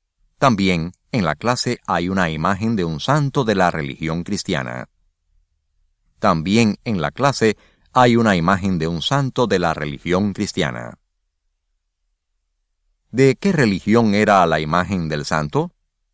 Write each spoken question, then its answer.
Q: ¿De qué religión era la imagen del santo?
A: La imagen del santo era de la religión cristiana.